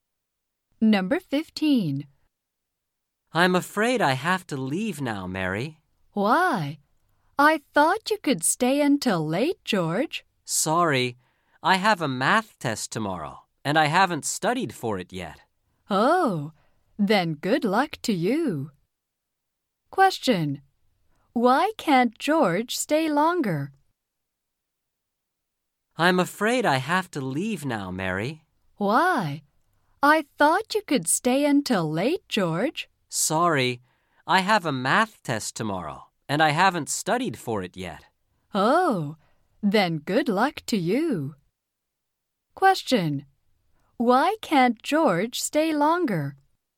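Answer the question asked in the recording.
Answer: He has to study for tomorrow's math test.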